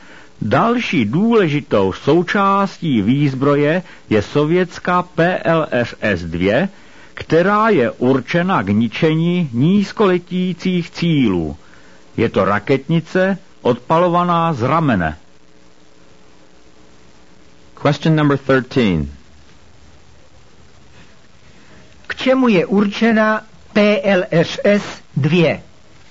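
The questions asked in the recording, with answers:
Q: K čemu je určena PLSS-2?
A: K ničení nízkoletících cílů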